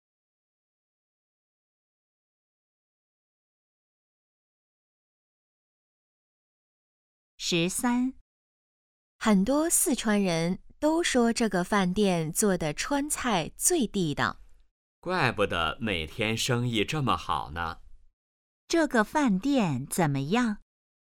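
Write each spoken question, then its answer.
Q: 这个饭店怎么样?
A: 川菜很地道,生意很好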